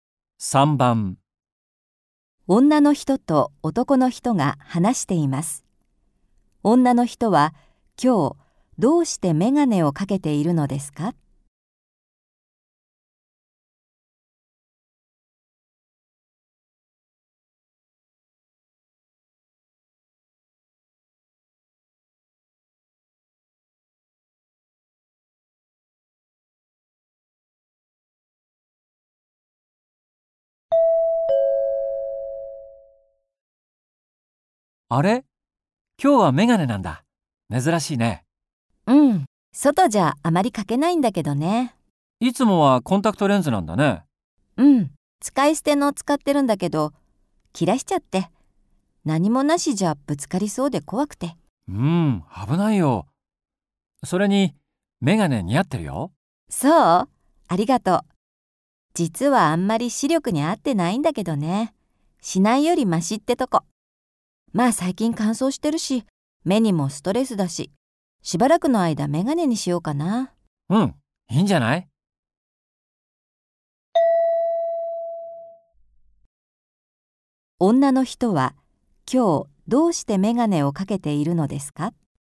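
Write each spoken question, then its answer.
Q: 女の人は、今日どうしてメガネをかけているのですか?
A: 使い捨てのコンタクトレンズを切らしてしまったから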